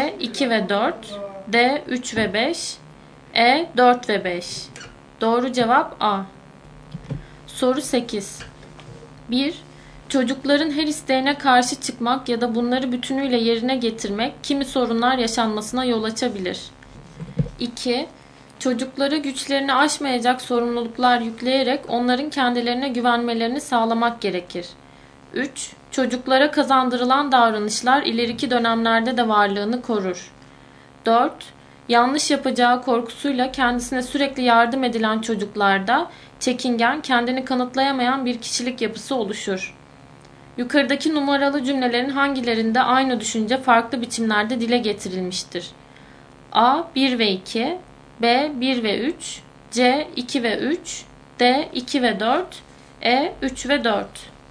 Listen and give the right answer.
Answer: Doğru cevap D.